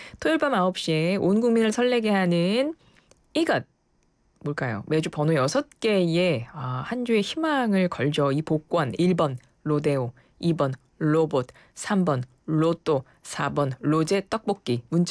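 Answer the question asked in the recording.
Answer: 3: 로또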